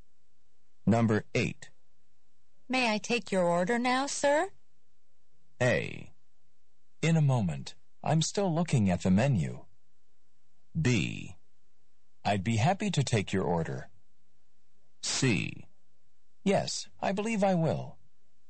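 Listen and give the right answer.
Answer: A: In a moment. I'm still looking at the menu.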